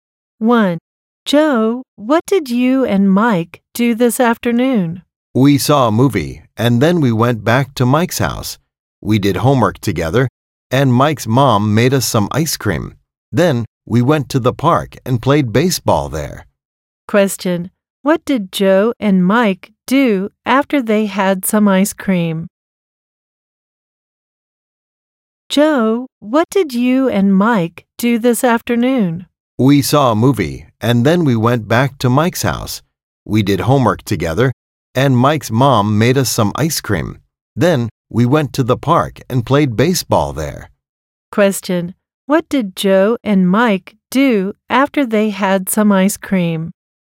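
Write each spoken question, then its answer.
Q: What did Joe and Mike do after they had some ice cream?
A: They went to the park and played baseball.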